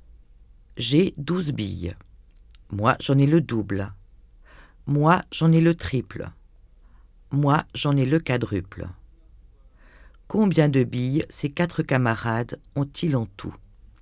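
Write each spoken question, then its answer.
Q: Combien de billes ces 4 camarades ont-ils en tout ?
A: 120 billes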